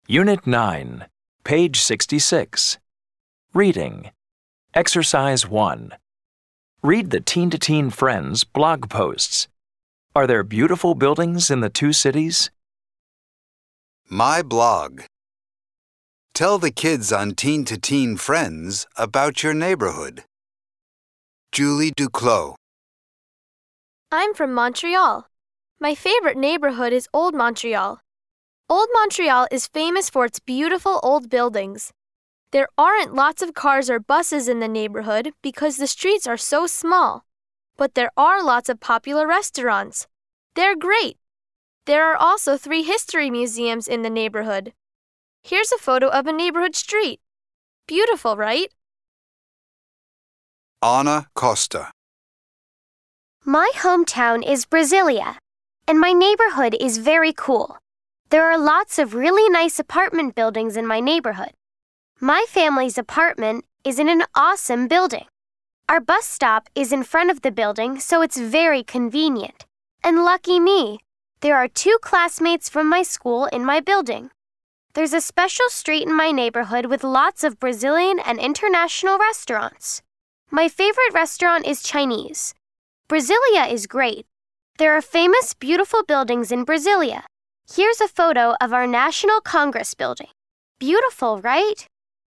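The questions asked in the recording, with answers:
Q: Are there beautiful buildings in the two cities?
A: Yes, there are beautiful buildings in both Montreal and Brasilia.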